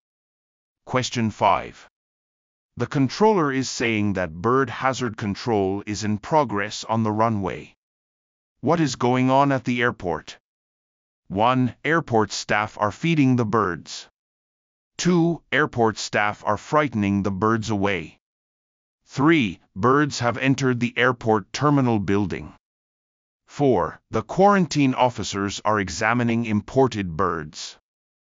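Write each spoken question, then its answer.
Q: What is going on at the airport?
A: 2: Airport staff are frightening the birds away.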